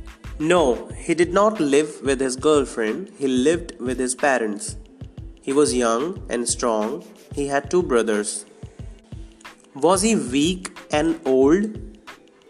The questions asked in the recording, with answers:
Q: Was he weak and old?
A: No, he was not weak and old, he was young and strong.